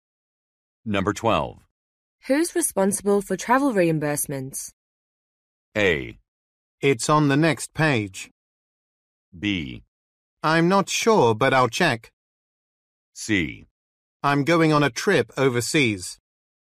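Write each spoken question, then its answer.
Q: Who's responsible for travel reimbursements?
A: B: I'm not sure, but I'll check.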